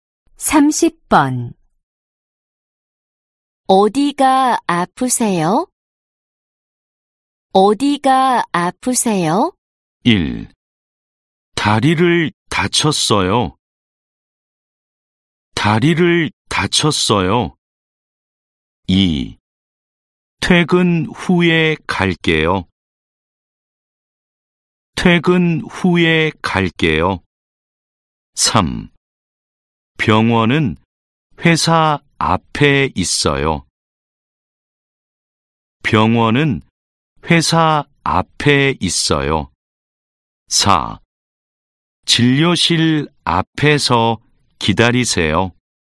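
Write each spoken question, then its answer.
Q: 어디가 아프세요?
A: 1: 다리를 다쳤어요.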